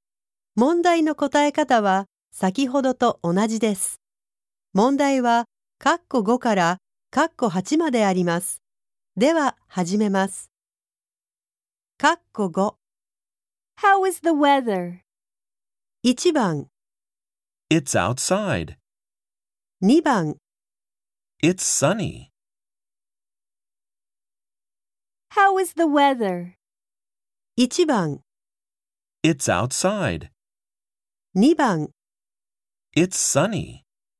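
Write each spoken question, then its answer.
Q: How is the weather?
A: 2: It's sunny.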